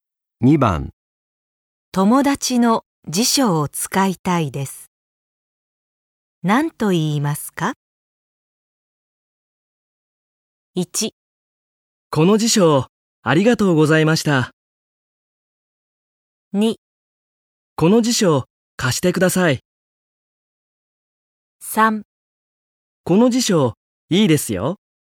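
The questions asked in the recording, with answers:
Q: 友達の辞書を使いたいです。何と言いますか?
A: 2: この辞書、貸してください。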